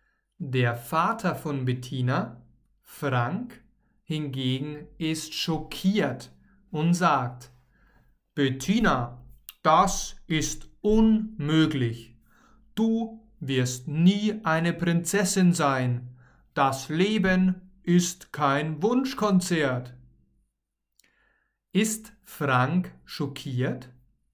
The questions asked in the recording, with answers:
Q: Ist Frank schockiert?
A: Ja, er ist schockiert.